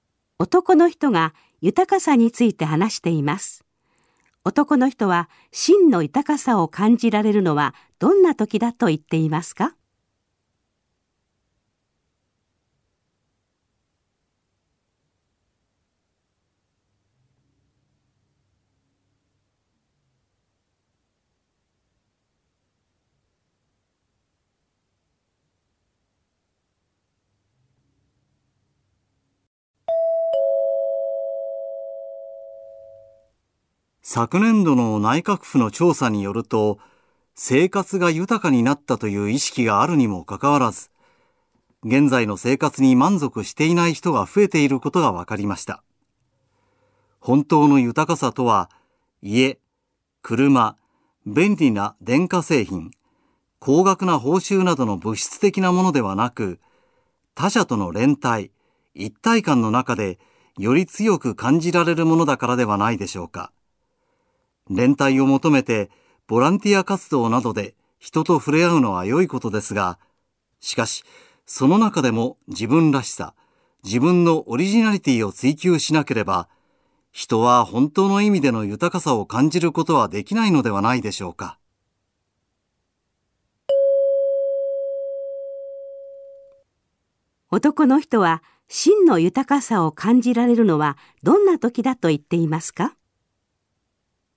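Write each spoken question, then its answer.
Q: 男の人は、真の豊かさを感じられるのはどんな時だと言っていますか?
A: 他者との連帯の中で自分らしさ・オリジナリティを追求する時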